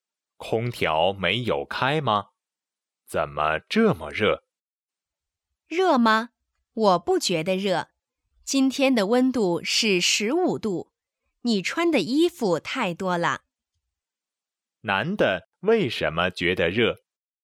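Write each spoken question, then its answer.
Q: 男的为什么觉得热?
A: 穿的衣服太多了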